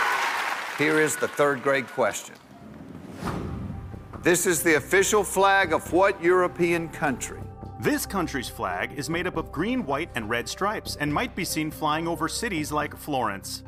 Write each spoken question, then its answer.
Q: This is the official flag of what European country?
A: Unfortunately, it's Italy.